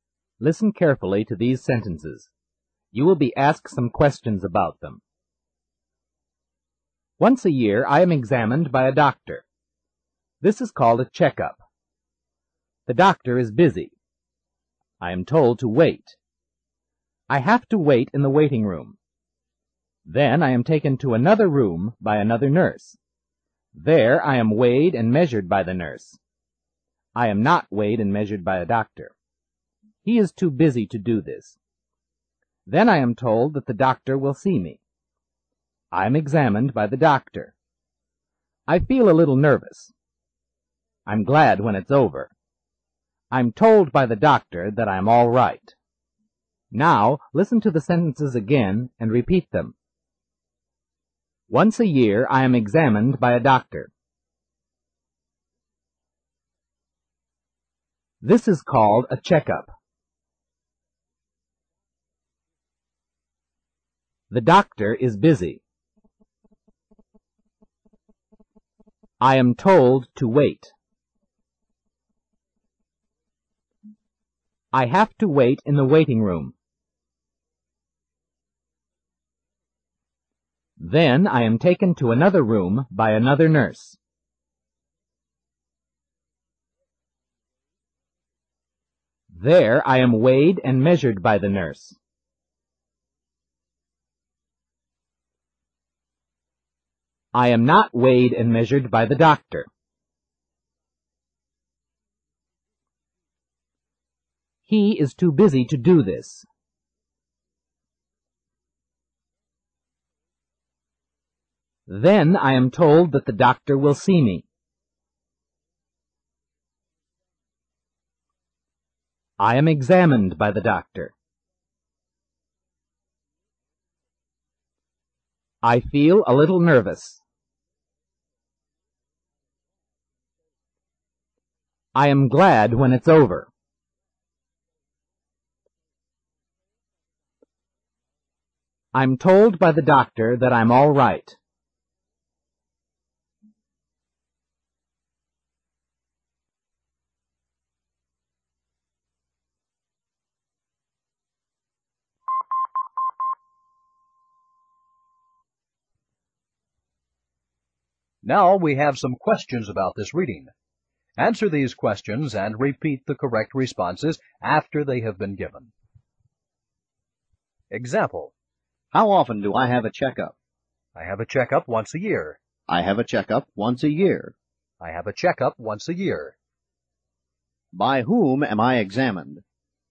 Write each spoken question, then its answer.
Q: By whom am I examined?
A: I am examined by the doctor.